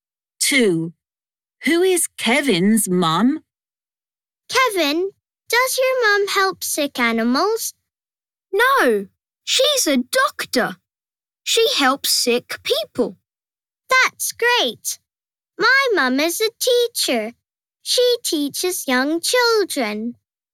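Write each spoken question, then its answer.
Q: Who is Kevin's mum?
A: a doctor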